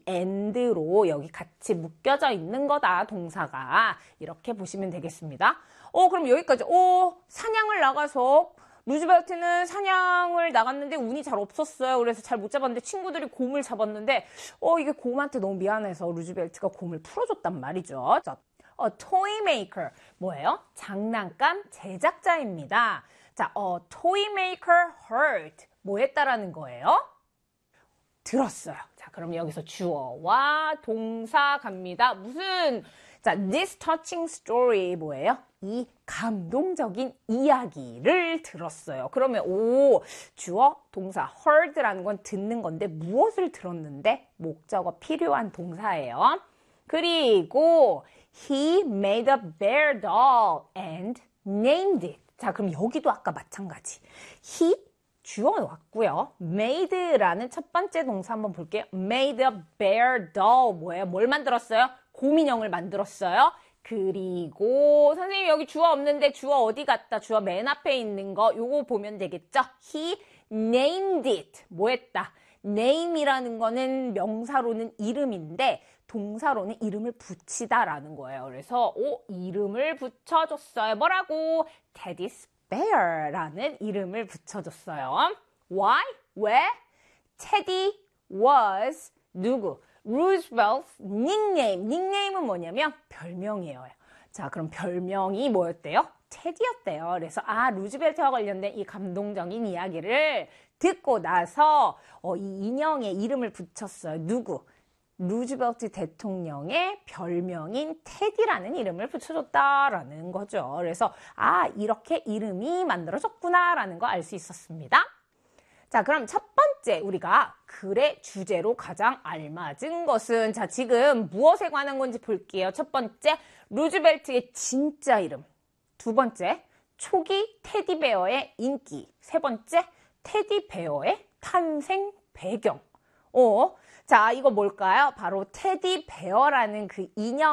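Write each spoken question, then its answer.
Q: 자, 그럼 첫 번째 우리가 글의 주제로 가장 알맞은 것은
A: 3: 테디베어의 탄생 배경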